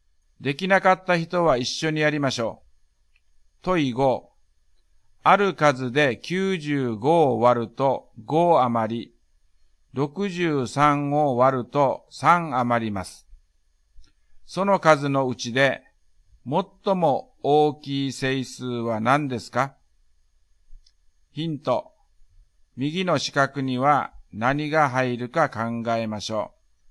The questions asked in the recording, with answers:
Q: ある数で95を割ると5余り、63を割ると3余ります。 その数のうちで、最も大きい整数は何ですか?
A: 90と60の最大公約数は30です。30が答えです。